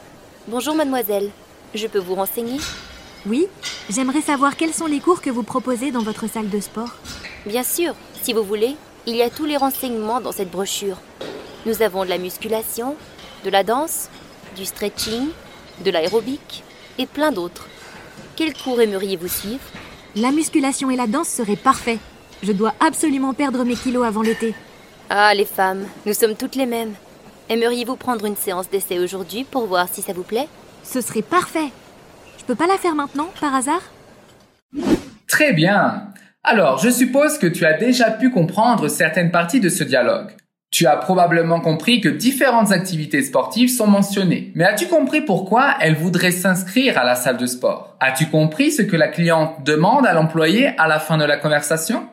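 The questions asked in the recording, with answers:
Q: Mais as-tu compris pourquoi elle voudrait s'inscrire à la salle de sport ?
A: Pour perdre ses kilos avant l'été

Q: As-tu compris ce que la cliente demande à l'employé à la fin de la conversation ?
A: Si elle peut faire la séance d'essai maintenant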